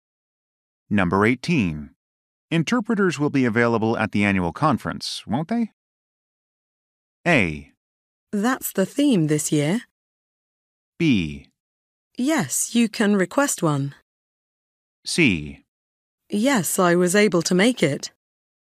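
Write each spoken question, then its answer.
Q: Interpreters will be available at the annual conference, won't they?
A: B: Yes, you can request one.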